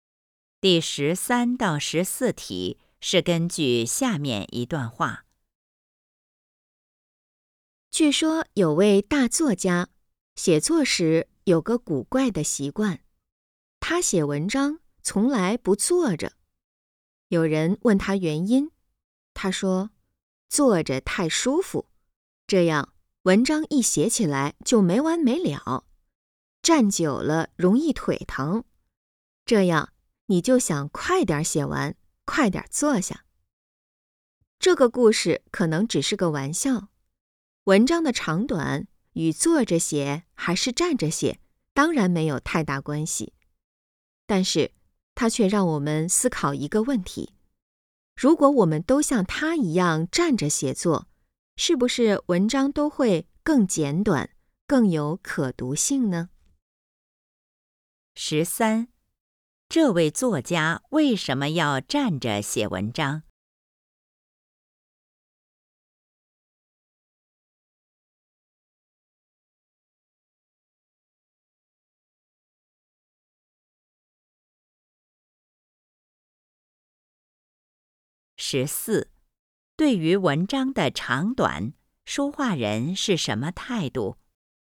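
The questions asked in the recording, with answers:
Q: 这位作家为什么要站着写文章?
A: 站久了腿疼,就想快点写完,文章不会太长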